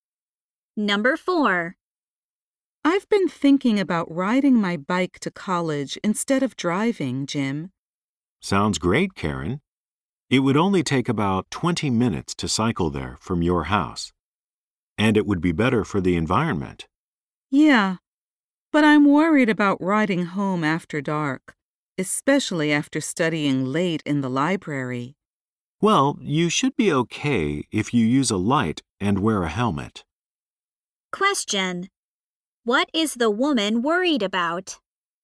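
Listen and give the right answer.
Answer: Riding her bike home after dark.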